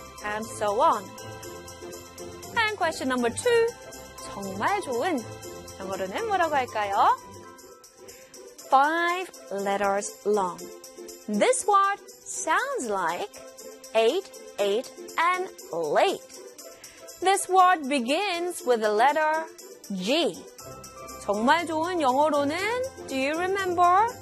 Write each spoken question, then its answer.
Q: 정말 좋은. 영어로는 뭐라고 할까요?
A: It was G-R-E-A-T, great, great.